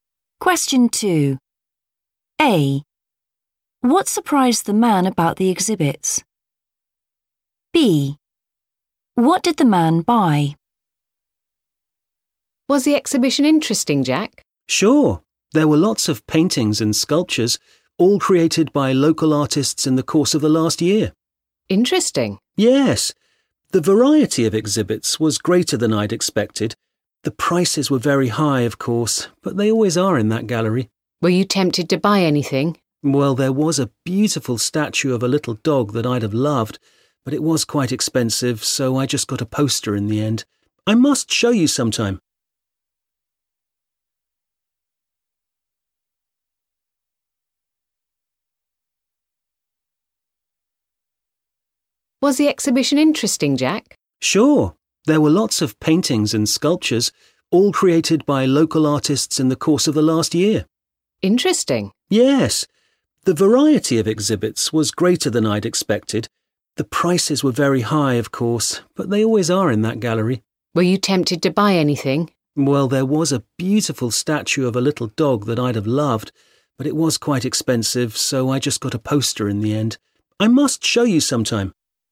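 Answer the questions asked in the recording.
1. their variety
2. a poster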